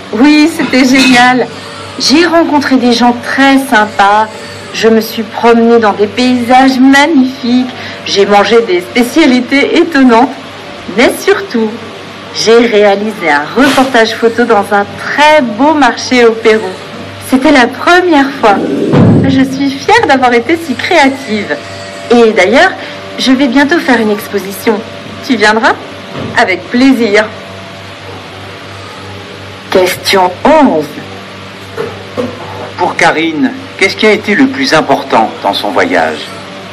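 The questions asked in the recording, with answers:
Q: Pour Karine, qu'est-ce qui a été le plus important dans son voyage?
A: Avoir réalisé un reportage photo dans un marché au Pérou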